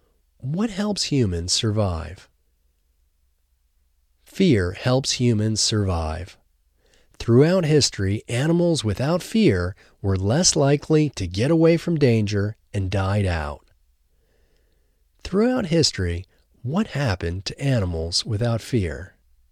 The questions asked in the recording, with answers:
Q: Throughout history, what happened to animals without fear?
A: Throughout history, animals without fear were less likely to get away from danger and died out.